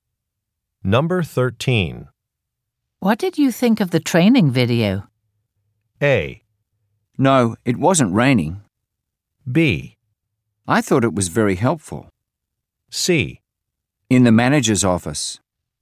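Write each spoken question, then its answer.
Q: What did you think of the training video?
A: B: I thought it was very helpful.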